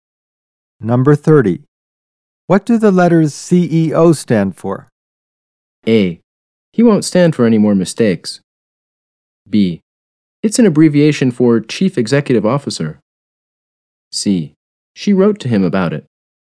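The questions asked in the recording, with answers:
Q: What do the letters CEO stand for?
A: B: It's an abbreviation for Chief Executive Officer.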